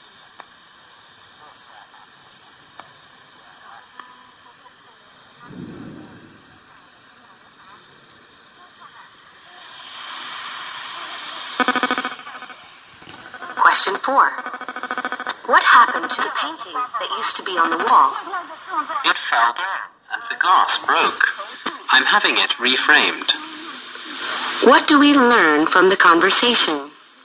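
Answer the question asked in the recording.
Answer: The painting fell and the glass broke; it is being reframed.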